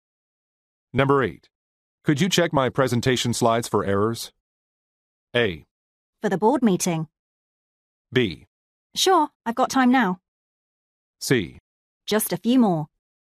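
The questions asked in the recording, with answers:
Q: Could you check my presentation slides for errors?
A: B: Sure, I've got time now.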